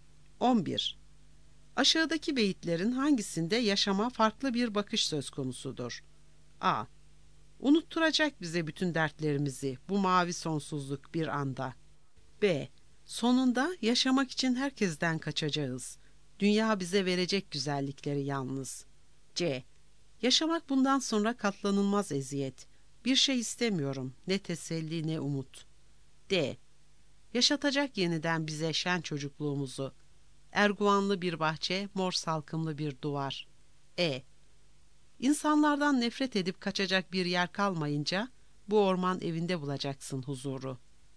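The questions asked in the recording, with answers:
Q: Aşağıdaki beyitlerin hangisinde yaşama farklı bir bakış söz konusudur?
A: C: Yaşamak bundan sonra katlanılmaz eziyet.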